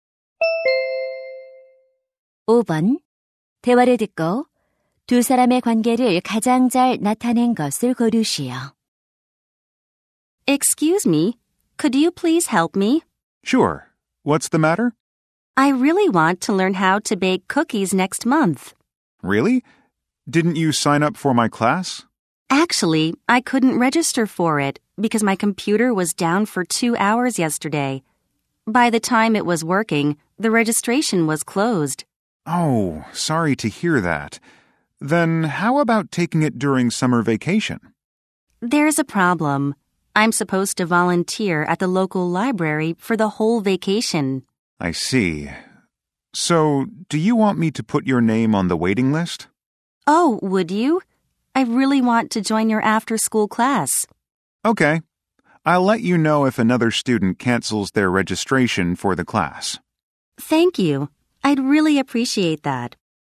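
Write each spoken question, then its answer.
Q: 대화를 듣고 두 사람의 관계를 가장 잘 나타낸 것을 고르시오.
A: 제빵 방과후 수업 교사와 학생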